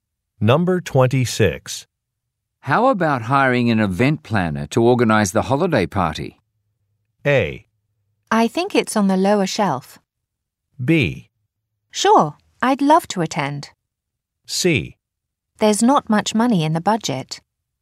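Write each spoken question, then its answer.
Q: How about hiring an event planner to organize the holiday party?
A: C: There's not much money in the budget.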